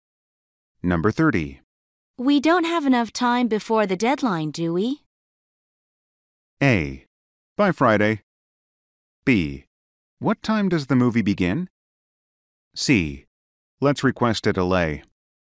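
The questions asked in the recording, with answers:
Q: We don't have enough time before the deadline, do we?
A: C: Let's request a delay.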